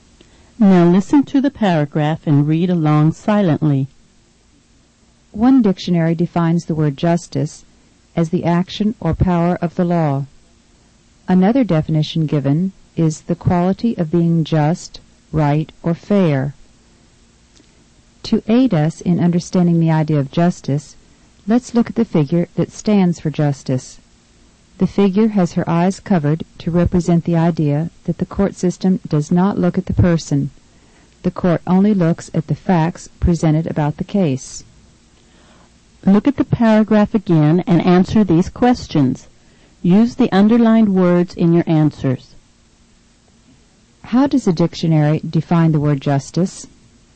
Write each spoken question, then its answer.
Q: How does a dictionary define the word justice?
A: The word justice is defined as the action or power of the law.